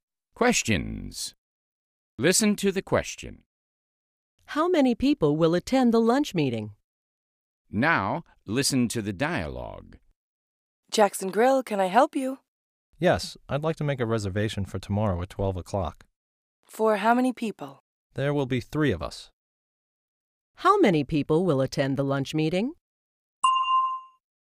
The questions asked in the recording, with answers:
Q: How many people will attend the lunch meeting?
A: There will be three people, Mr.